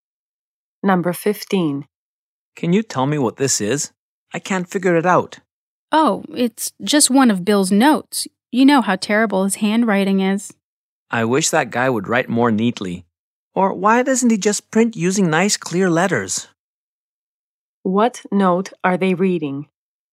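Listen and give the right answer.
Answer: One of Bill's notes, in messy handwriting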